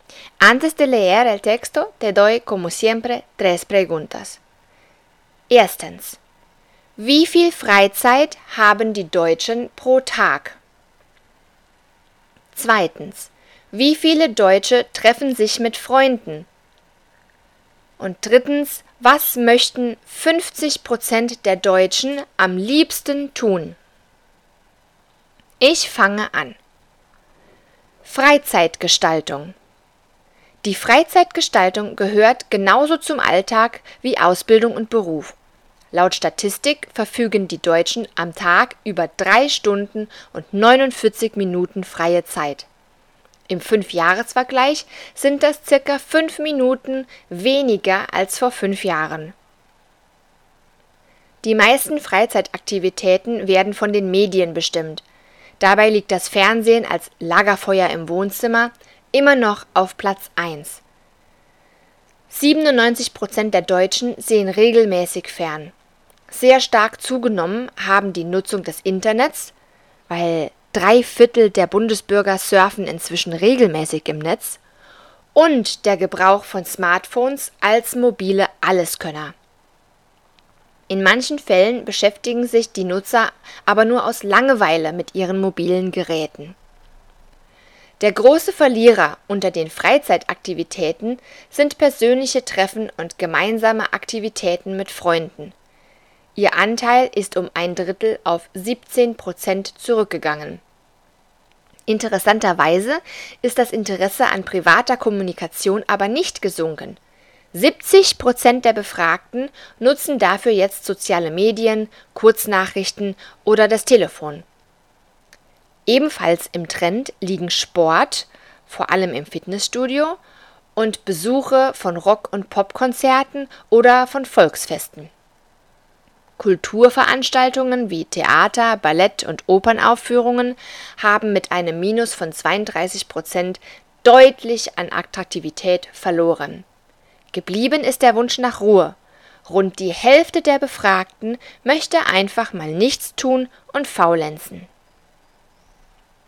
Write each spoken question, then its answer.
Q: Wie viel Freizeit haben die Deutschen pro Tag?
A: Es sind drei Stunden und 49 Minuten.

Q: Wie viele Deutsche treffen sich mit Freunden?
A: Das waren 17 Prozent.

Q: was möchten 50 der Deutschen am liebsten tun?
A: Nichts. Sie möchten einfach mal nichts tun und faulenzen.